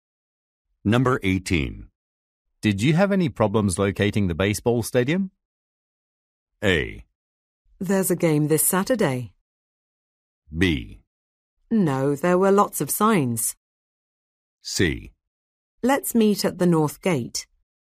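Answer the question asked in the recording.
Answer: B: No, there were lots of signs.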